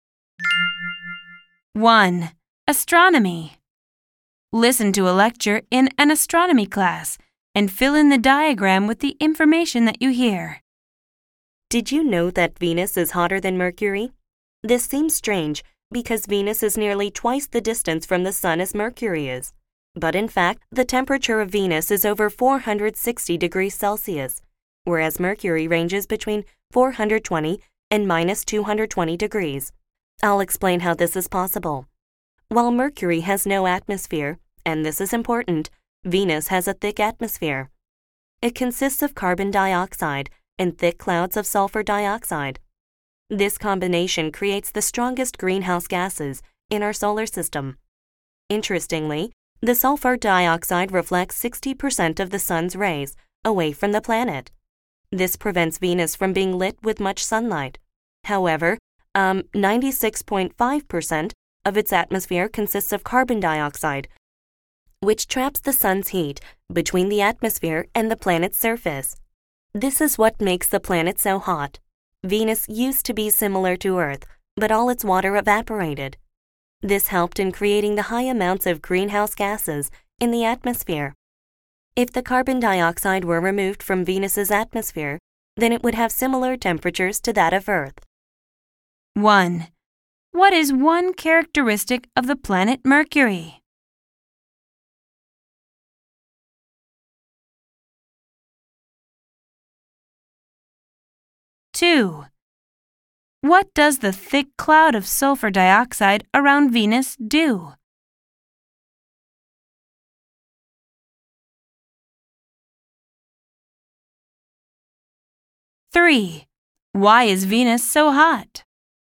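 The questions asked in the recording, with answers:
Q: What is one characteristic of the planet Mercury?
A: It has no atmosphere

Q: What does the thick cloud of sulfur dioxide around Venus do?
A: It reflects 60% of the sun's rays away from the planet

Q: Why is Venus so hot?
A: Its carbon dioxide atmosphere traps the sun's heat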